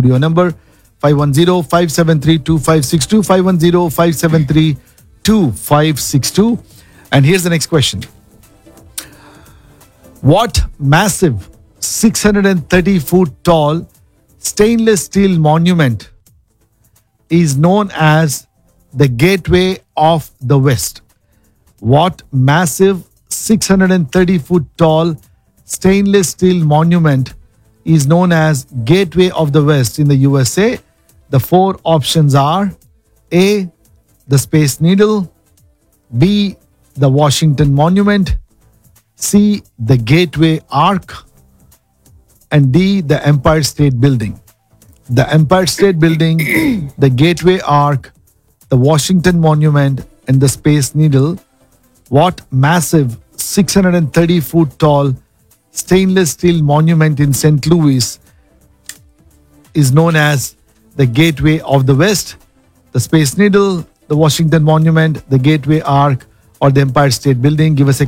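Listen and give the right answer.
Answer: C: the Gateway Arc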